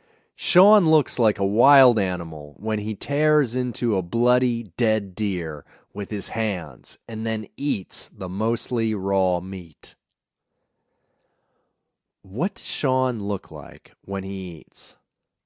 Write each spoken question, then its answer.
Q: What does Sean look like when he eats?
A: Sean looks like a wild animal when he eats.